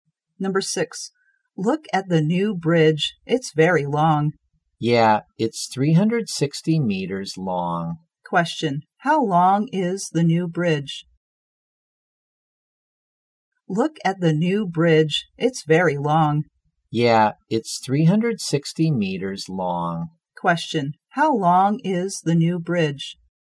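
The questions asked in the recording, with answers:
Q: how long is the new bridge?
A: 360 meters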